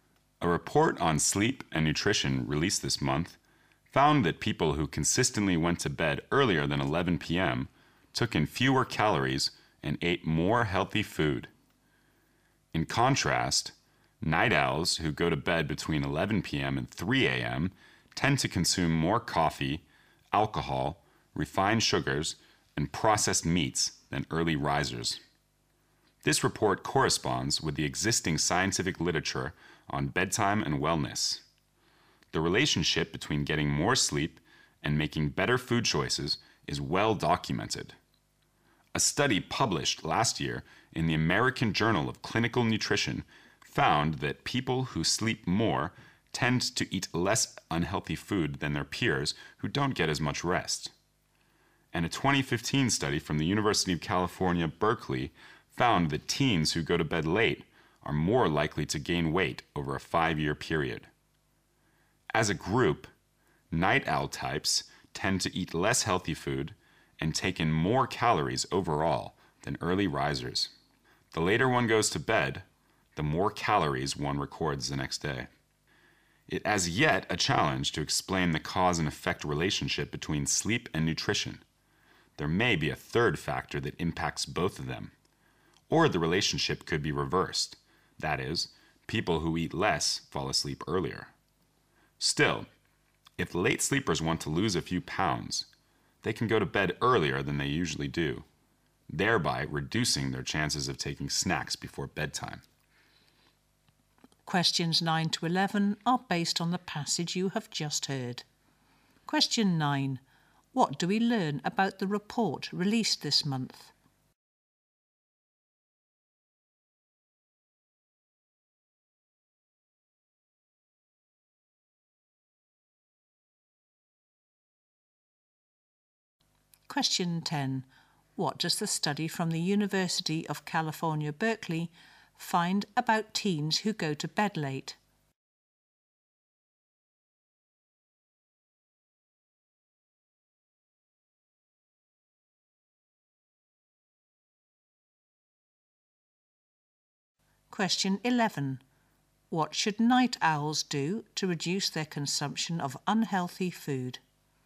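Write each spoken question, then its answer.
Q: What do we learn about the report released this month?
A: People who go to bed before 11 p.m. take in fewer calories and eat healthier food

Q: What does the study from the University of California, Berkeley find about teens who go to bed late?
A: They are more likely to gain weight over a 5-year period

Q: What should night owls do to reduce their consumption of unhealthy food?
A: Go to bed earlier than usual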